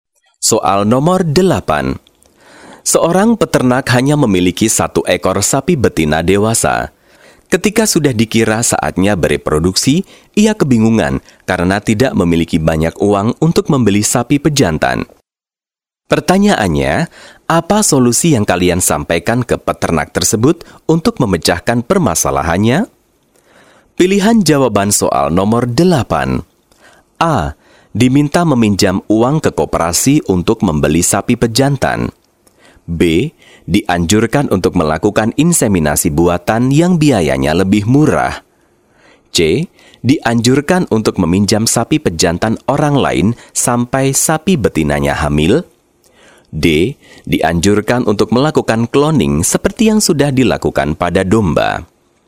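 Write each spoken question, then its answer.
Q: Pertanyaannya, apa solusi yang kalian sampaikan ke peternak tersebut untuk memecahkan permasalahannya?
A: B: Dianjurkan untuk melakukan inseminasi buatan yang biayanya lebih murah.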